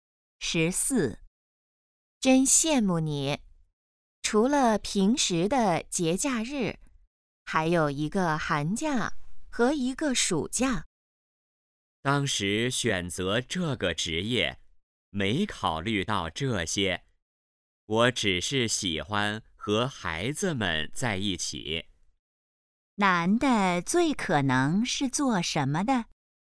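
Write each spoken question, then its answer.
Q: 男的最可能是做什么的?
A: 老师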